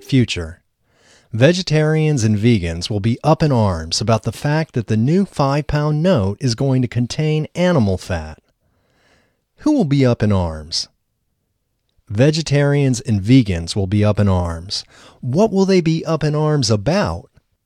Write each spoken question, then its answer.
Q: Who will be up in arms?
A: Vegetarians and vegans will be up in arms.